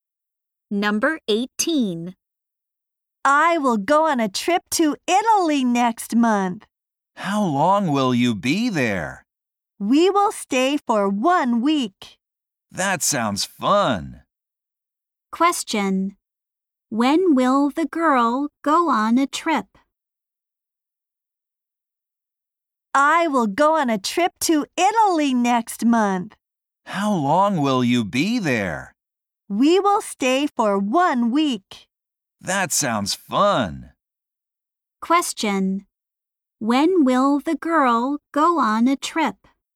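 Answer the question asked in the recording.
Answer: Next month.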